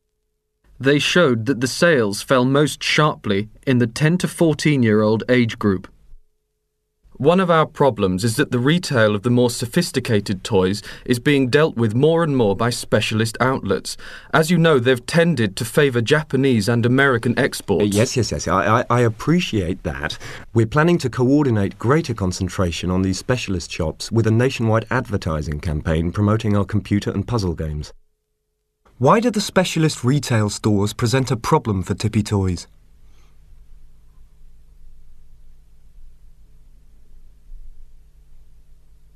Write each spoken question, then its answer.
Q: Why do the specialist retail stores present a problem for Tippy Toys?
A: Because they buy mostly foreign-made toys and games.